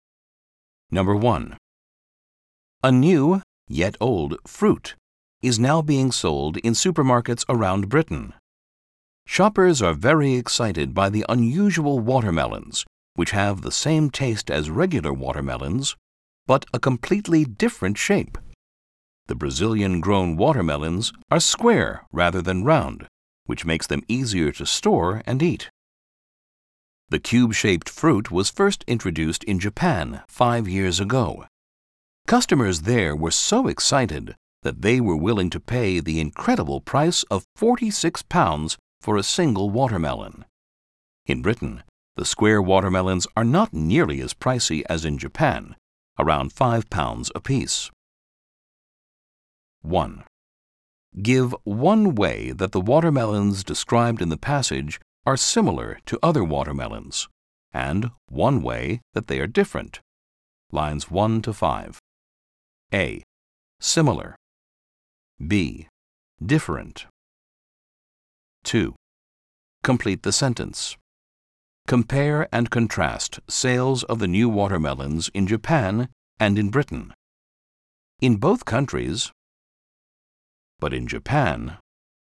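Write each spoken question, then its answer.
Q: Give one way that the watermelons described in the passage are similar to other watermelons, and one way that they are different.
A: Similar: same taste; different: square shape

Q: Compare and contrast sales of the new watermelons in Japan and in Britain.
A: In both countries they are sold, but in Japan they cost much more (£46 vs about £5)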